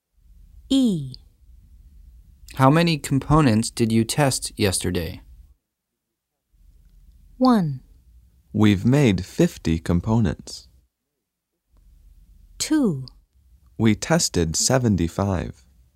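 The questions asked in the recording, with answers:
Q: How many components did you test yesterday?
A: 2: We tested 75.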